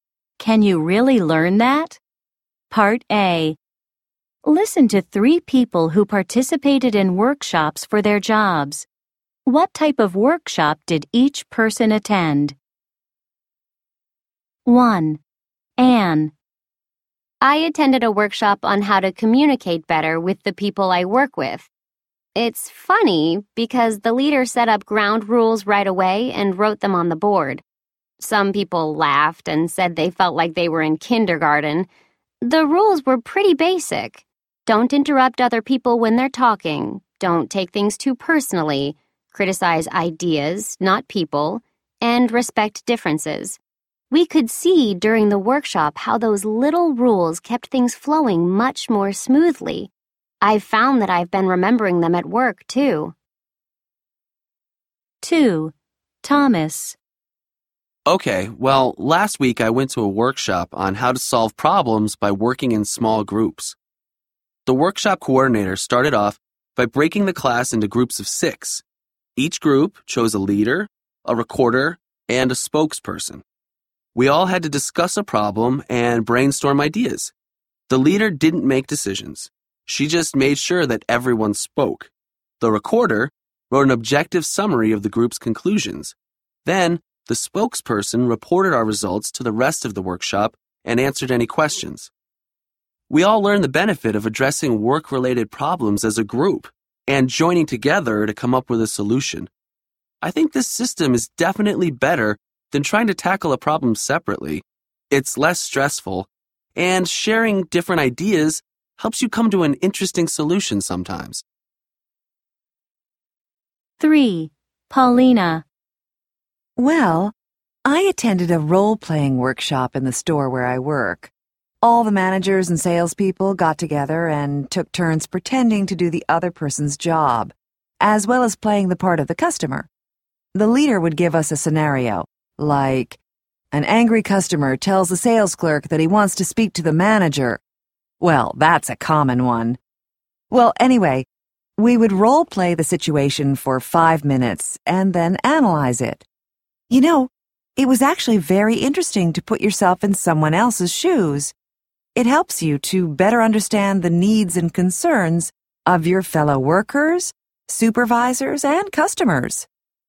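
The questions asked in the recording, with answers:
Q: What type of workshop did each person attend? 1. Anne.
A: A workshop on how to communicate better with coworkers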